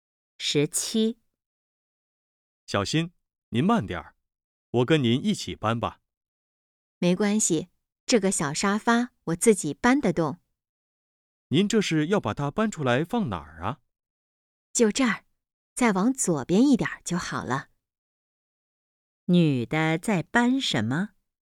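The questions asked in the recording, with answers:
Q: 女的在搬什么?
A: 小沙发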